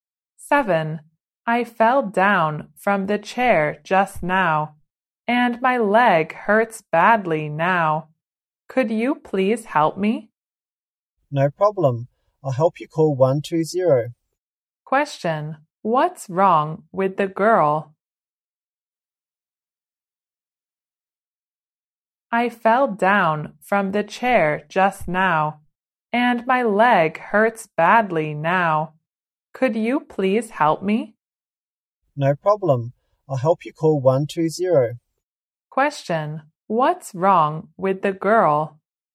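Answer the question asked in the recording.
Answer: Her leg hurts badly after falling from a chair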